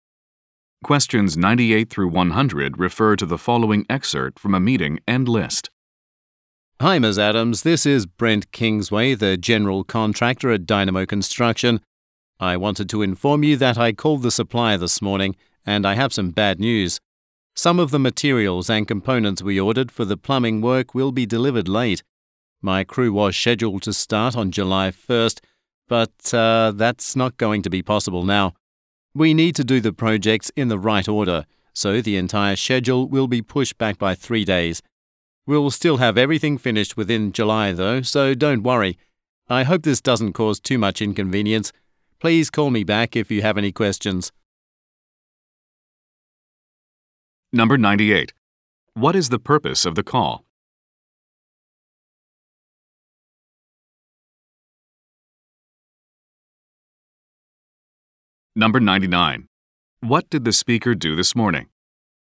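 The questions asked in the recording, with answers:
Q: What is the purpose of the call?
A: To report a schedule delay

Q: What did the speaker do this morning?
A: Called the supplier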